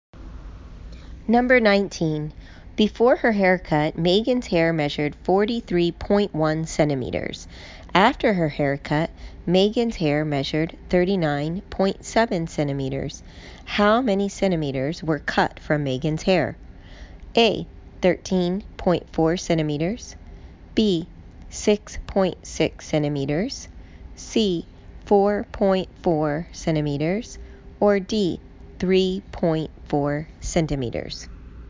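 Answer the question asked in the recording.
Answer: D: 3.4 centimeters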